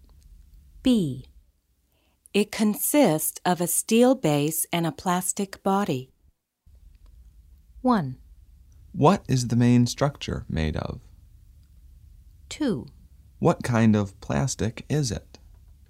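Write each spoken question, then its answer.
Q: It consists of a steel base and a plastic body.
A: 1: What is the main structure made of?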